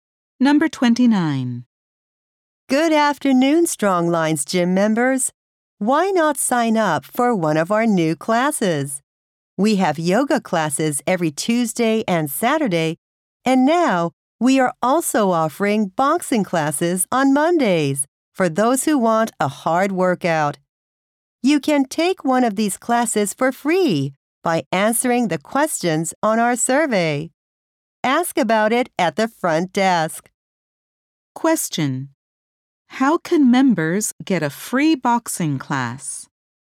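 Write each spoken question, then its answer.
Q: How can members get a free boxing class?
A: By answering the questions on the survey.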